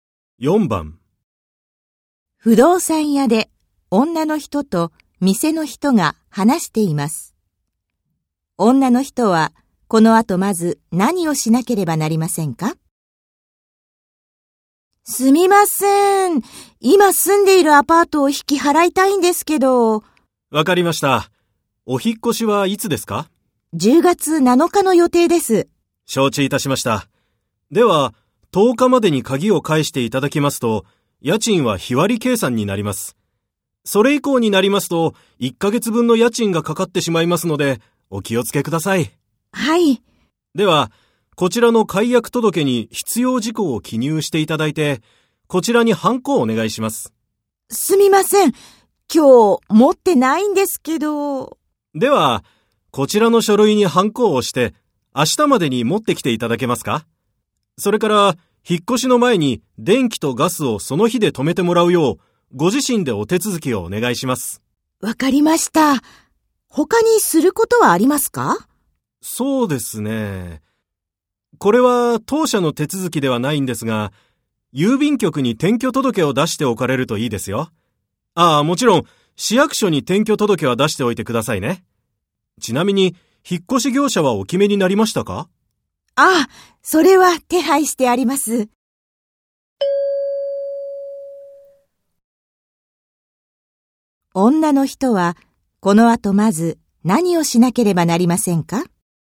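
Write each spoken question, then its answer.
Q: 女の人は、この後まず何をしなければなりませんか?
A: 解約届にハンコを押して、明日までに持っていく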